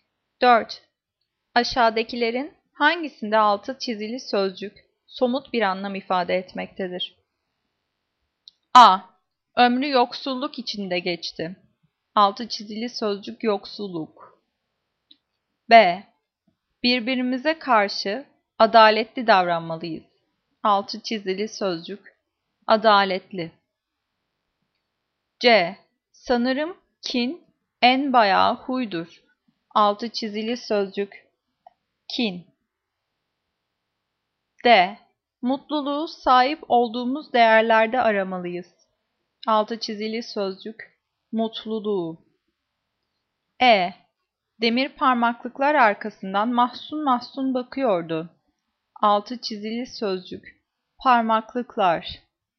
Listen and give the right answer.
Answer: Cevap E. Demir parmaklıklar arkasında mahzun mahzun bakıyordu.